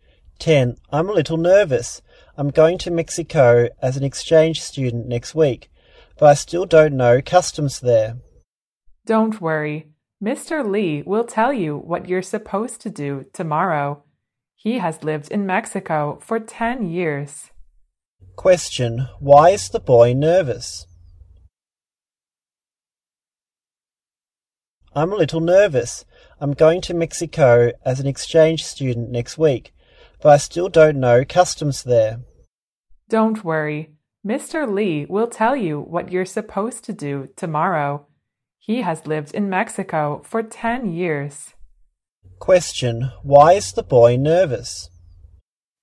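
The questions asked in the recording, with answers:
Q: why is the boy nervous?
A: He's going to Mexico as an exchange student and doesn't know the customs there.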